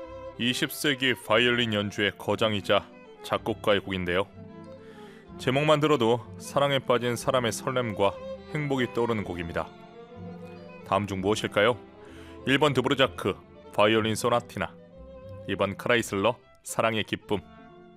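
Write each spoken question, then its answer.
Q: 다음 중 무엇일까요? 1번 드브르자크, 바이올린 소나티나, 2번 크라이슬러, 사랑의 기쁨.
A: 2: 크라이슬러, 사랑의 기쁨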